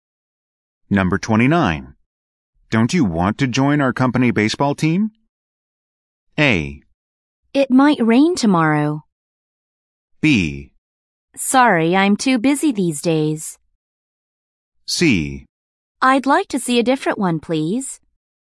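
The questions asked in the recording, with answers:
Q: Don't you want to join our company baseball team?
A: B: Sorry, I'm too busy these days.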